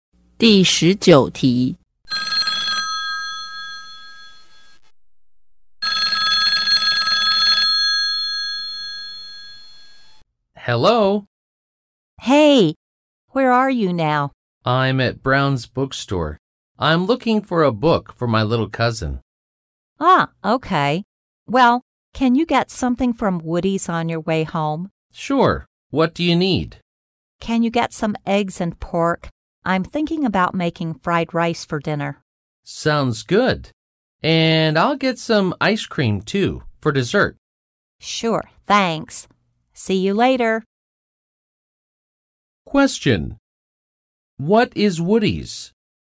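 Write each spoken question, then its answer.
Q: What is Woody's?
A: A supermarket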